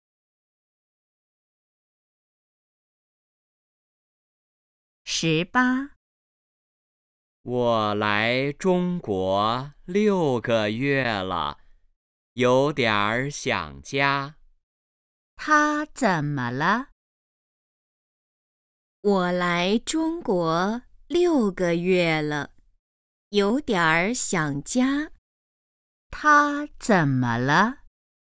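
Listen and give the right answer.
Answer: 有点儿想家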